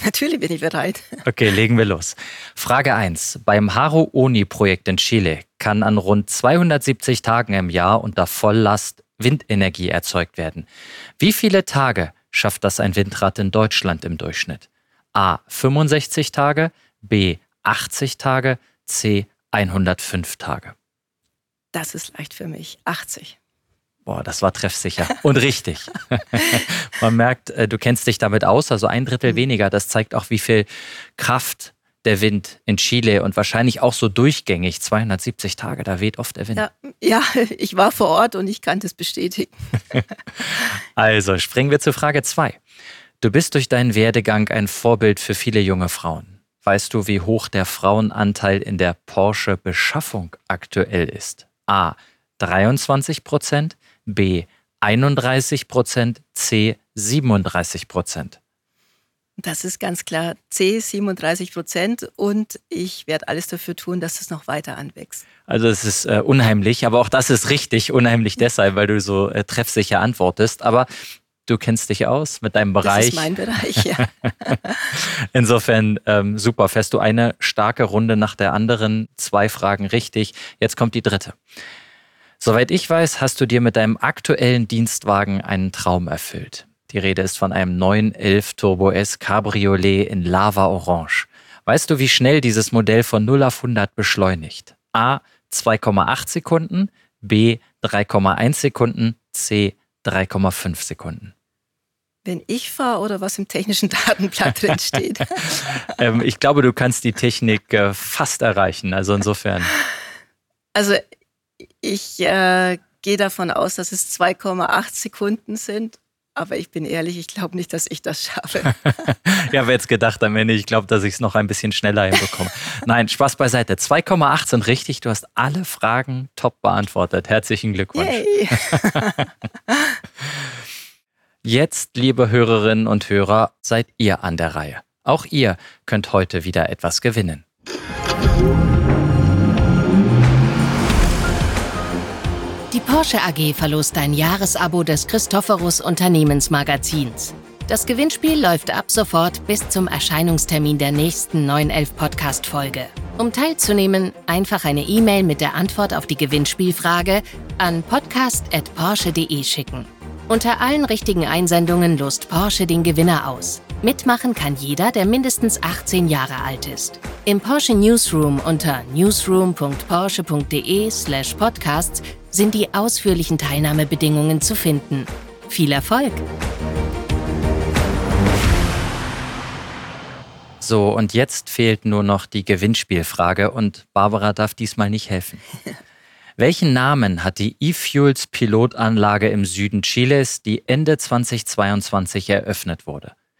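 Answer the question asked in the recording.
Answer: Haru Oni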